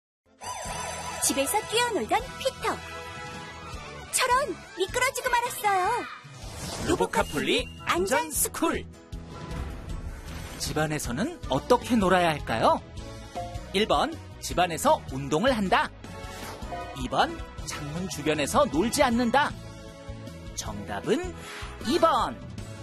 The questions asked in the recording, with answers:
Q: 집안에서는 어떻게 놀아야 할까요?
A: 정답은 2번.